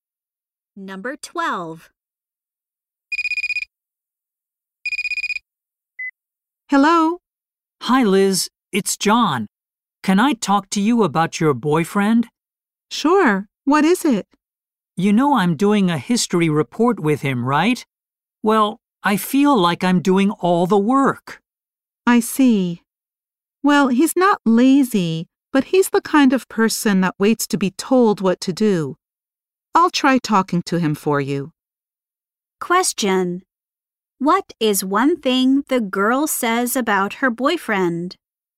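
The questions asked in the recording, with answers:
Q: What is one thing the girl says about her boyfriend?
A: He waits to be told what to do.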